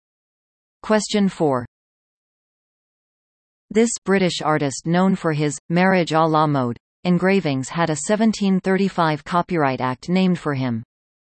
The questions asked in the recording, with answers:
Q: This British artist known for his Marriage à la Mode engravings had a 1735 Copyright Act named for him.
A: The answer? Hogarth.